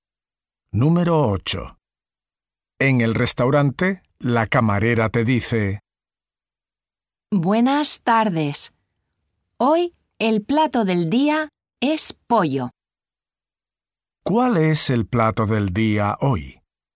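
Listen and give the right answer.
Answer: Pollo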